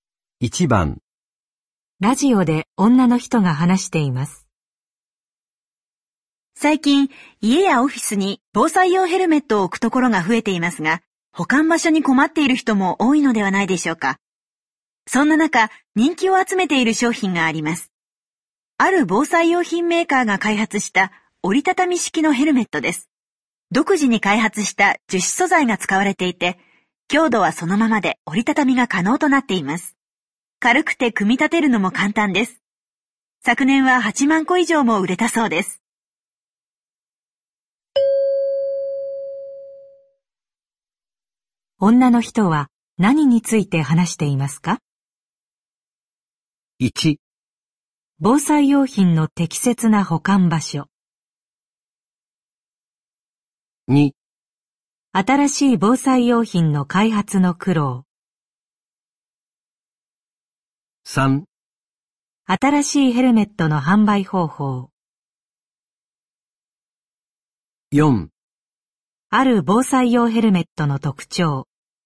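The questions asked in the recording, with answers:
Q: 女の人は何について話していますか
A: 4: ある防災用ヘルメットの特徴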